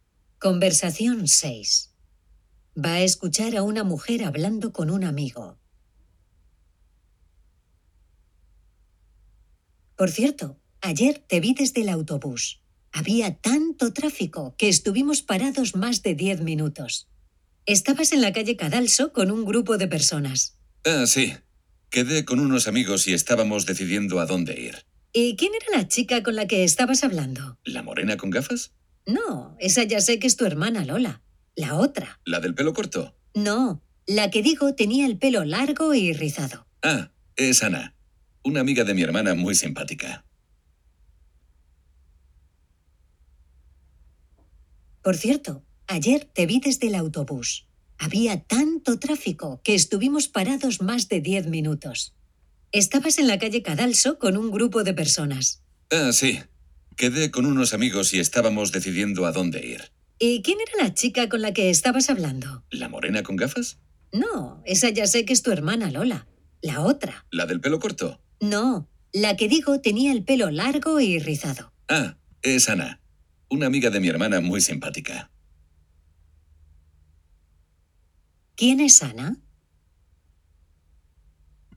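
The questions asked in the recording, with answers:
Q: ¿Quién es Ana?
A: Una amiga de la hermana, con el pelo largo y rizado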